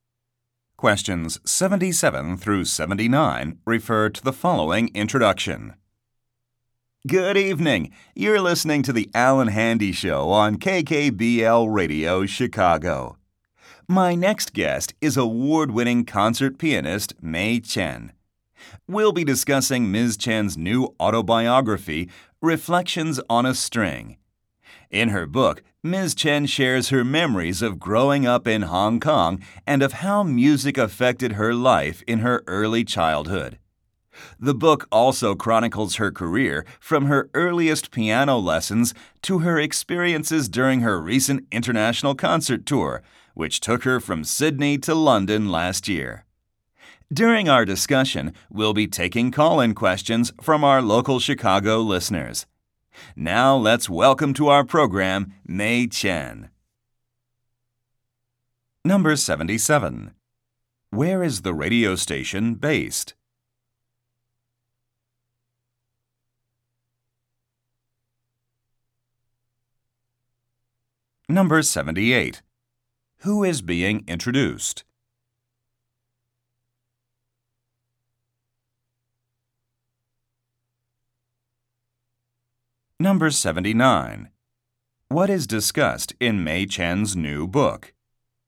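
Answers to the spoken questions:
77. Chicago
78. Concert pianist Mei Chen
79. Her life and music career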